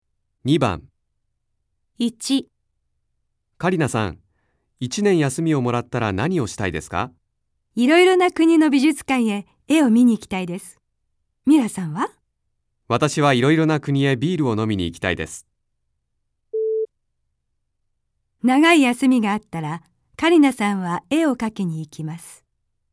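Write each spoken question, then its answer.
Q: 長い休みがあったらカリナさんは絵を描きに行きます。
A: ×(絵を見に行きたい)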